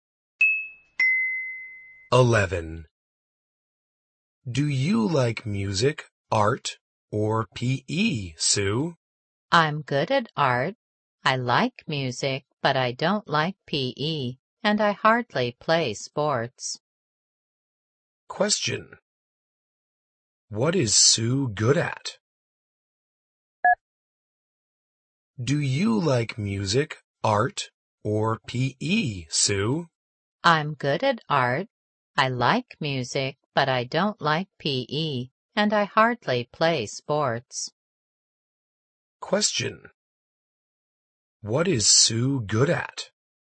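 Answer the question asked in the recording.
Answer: Art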